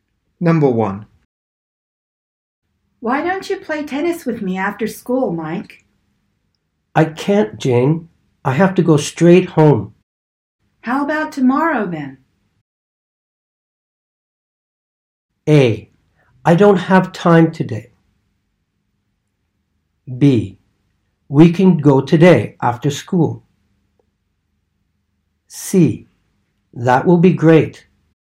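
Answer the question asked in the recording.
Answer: C: That will be great.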